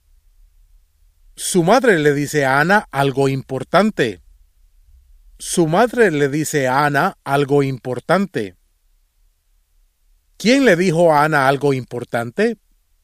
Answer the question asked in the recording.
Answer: Su madre le dijo a Ana algo importante.